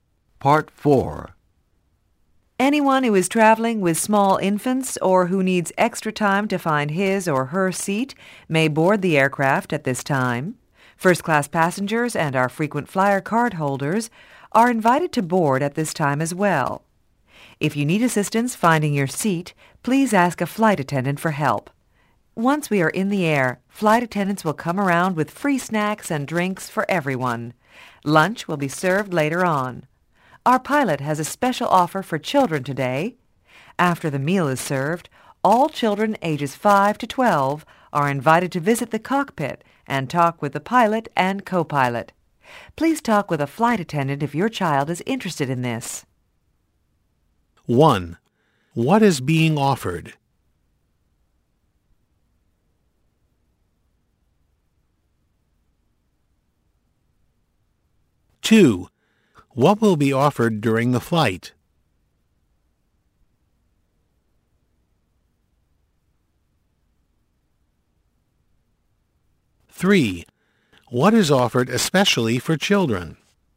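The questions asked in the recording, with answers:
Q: What will be offered during the flight?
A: Free snacks and drinks

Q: What is offered especially for children?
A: A visit to the cockpit to talk with the pilots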